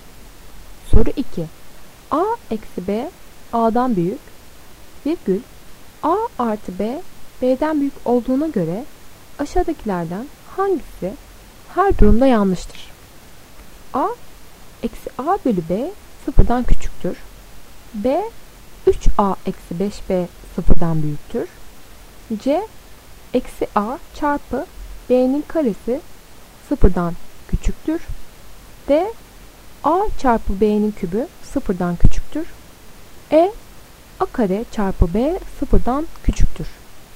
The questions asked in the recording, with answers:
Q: A eksi B A'dan büyük, virgül A artı B, B'den büyük olduğuna göre aşağıdakilerden hangisi her durumda yanlıştır?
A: Doğru cevap A. Eksi A bölü B sıfırdan küçüktür.